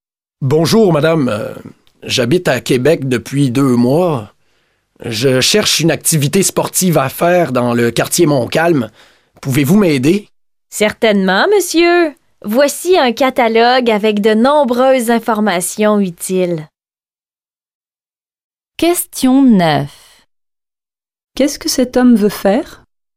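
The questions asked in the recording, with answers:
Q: Qu'est-ce que cet homme veut faire?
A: Une activité sportive dans le quartier Montcalm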